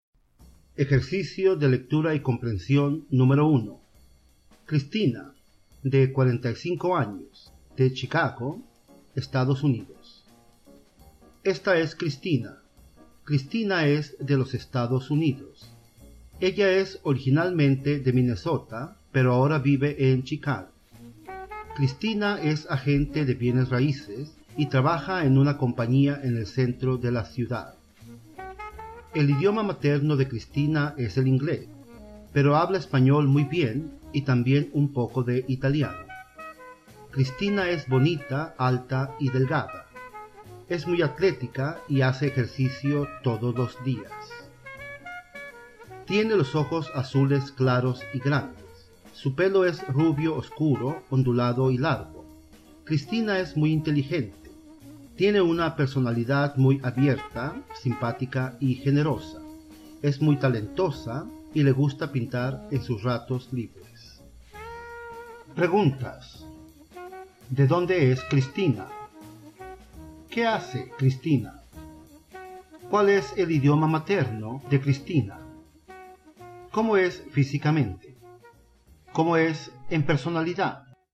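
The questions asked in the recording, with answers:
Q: ¿De dónde es Cristina?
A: De los Estados Unidos, originalmente de Minnesota; ahora vive en Chicago

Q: ¿Qué hace Cristina?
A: Es agente de bienes raíces

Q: ¿Cuál es el idioma materno de Cristina?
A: El inglés

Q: ¿Cómo es físicamente?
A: Bonita, alta y delgada, con ojos azules claros y grandes y pelo rubio oscuro, ondulado y largo

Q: ¿Cómo es en personalidad?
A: Abierta, simpática y generosa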